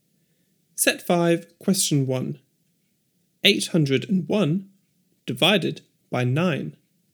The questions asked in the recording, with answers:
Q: 801 divided by 9.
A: 89.